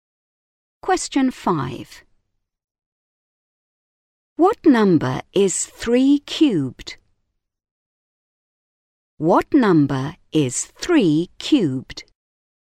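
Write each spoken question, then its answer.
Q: What number is 3 cubed?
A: 27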